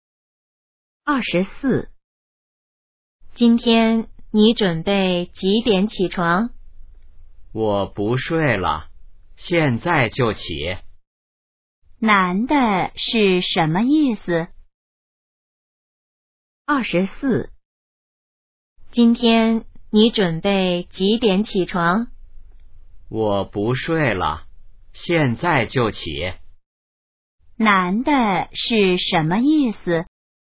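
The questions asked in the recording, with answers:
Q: 男的是什么意思?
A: 他不睡了,现在就起床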